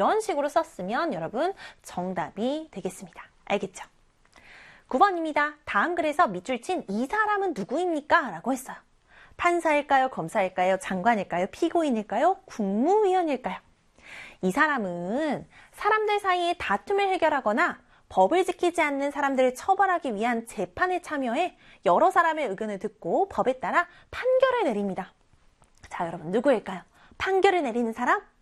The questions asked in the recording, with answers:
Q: 다음 글에서 밑줄 친이 사람은 누구입니까?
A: 맞아요. 바로 판사입니다.